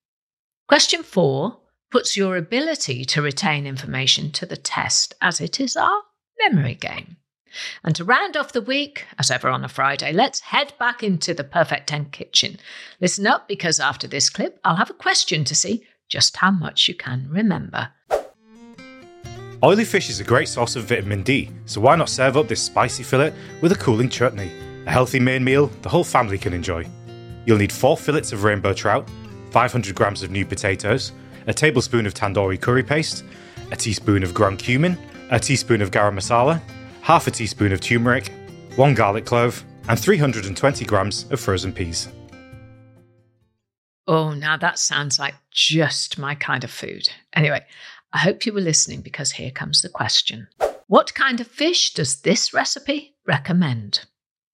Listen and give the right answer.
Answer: And the answer in the clip was rainbow trout.